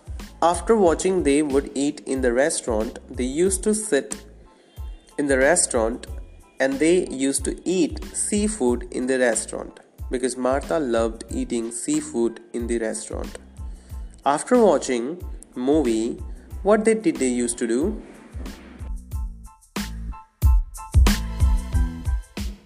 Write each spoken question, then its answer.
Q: After watching movie, what they did they used to do?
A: They used to eat in the restaurant.